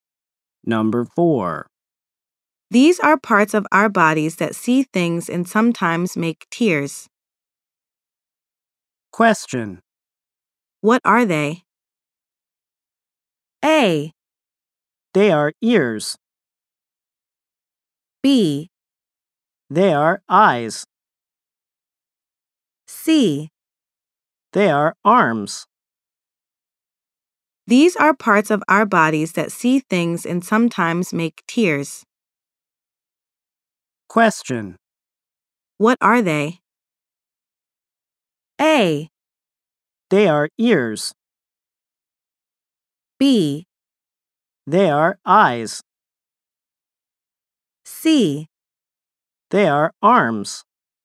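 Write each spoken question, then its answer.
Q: What are they?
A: B: They are eyes.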